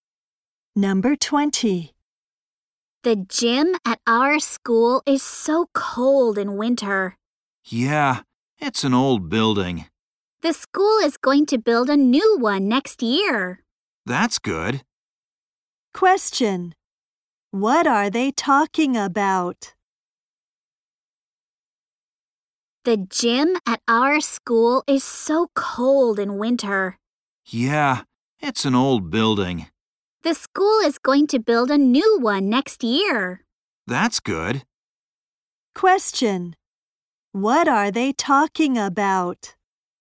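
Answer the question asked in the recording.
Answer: Their school gym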